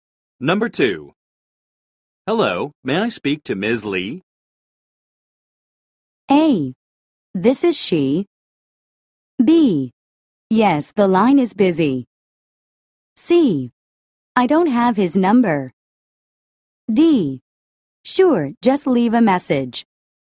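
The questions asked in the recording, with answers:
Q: Hello, may I speak to Ms. Lee?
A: A: This is she.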